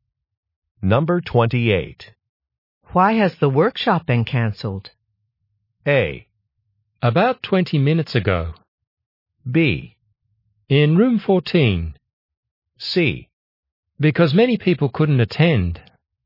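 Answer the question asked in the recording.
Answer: C: Because many people couldn't attend.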